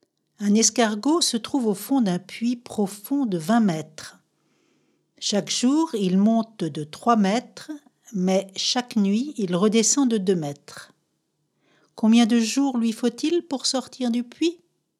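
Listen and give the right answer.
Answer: 18 jours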